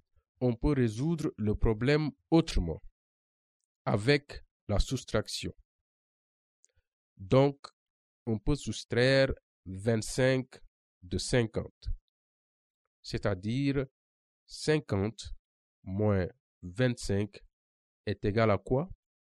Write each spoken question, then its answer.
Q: Donc, on peut soustraire 25 de 50, c'est-à-dire 50 moins 25 est égal à quoi?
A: 25.